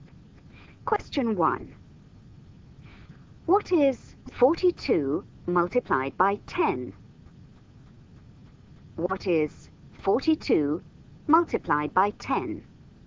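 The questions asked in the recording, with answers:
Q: What is 42 multiplied by 10?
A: 420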